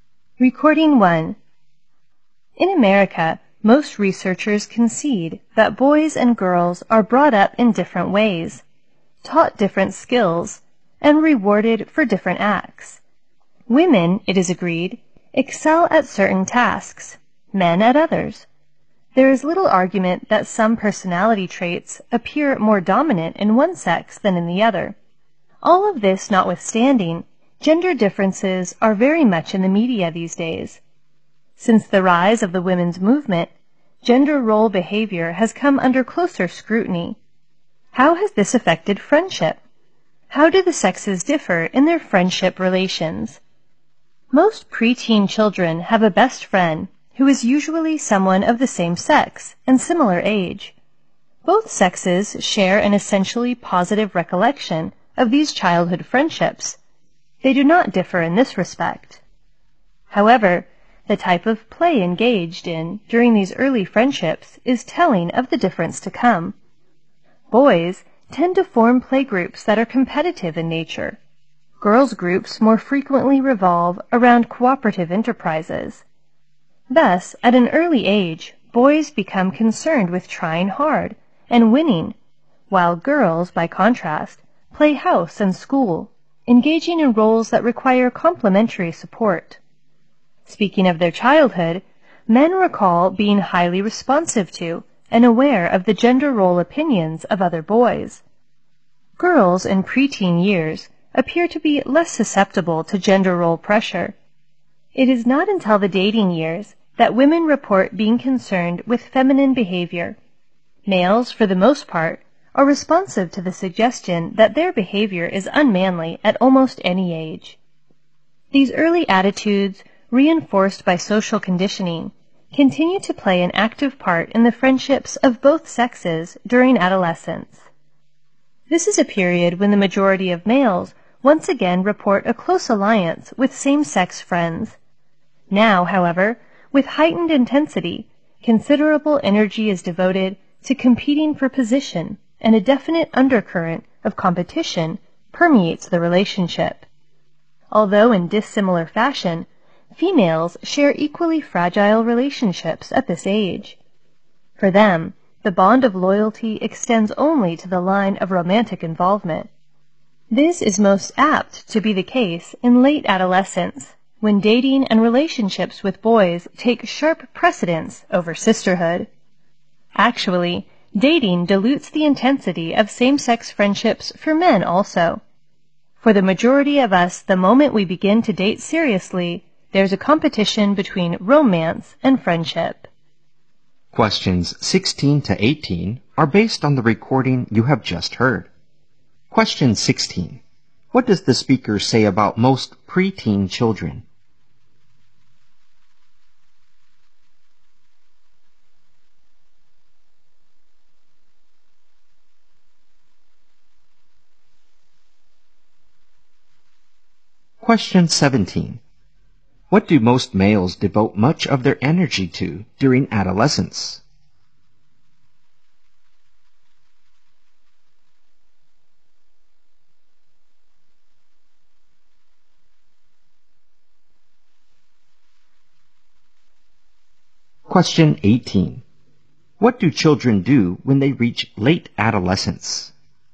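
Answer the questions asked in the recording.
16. They have a best friend of the same sex and similar age.
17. Competing for position among their same-sex friends.
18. They put dating and romantic relationships ahead of same-sex friendships.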